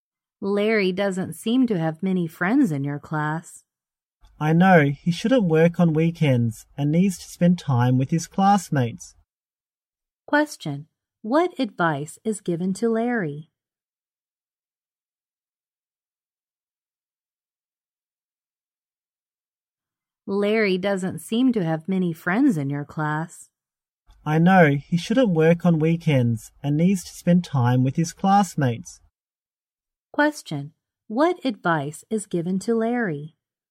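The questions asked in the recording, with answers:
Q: Question, what advice is given to Larry?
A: He shouldn't work on weekends and should spend time with his classmates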